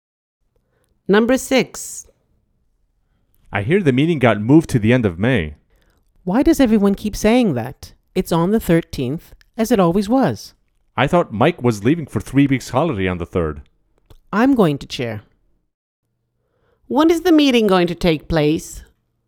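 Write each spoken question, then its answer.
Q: When is the meeting going to take place?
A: on the 13th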